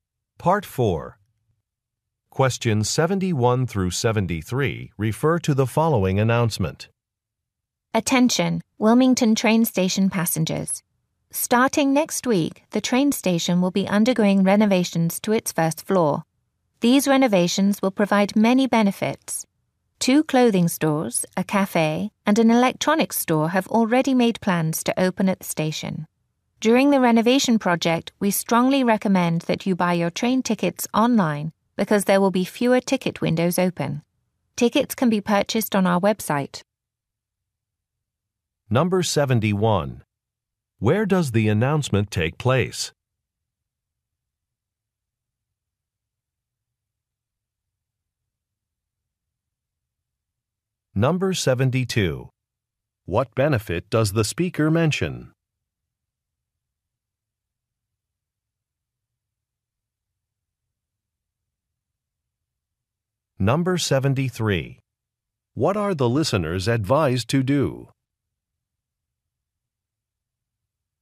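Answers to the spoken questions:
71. At a train station
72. New stores and a cafe will open at the station
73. Buy train tickets online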